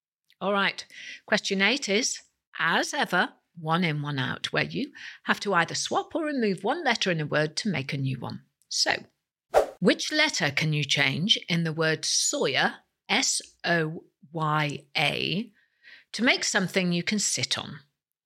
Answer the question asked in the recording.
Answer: The answer is change the letter Y for an F to get the word sofa, S-O-F-A.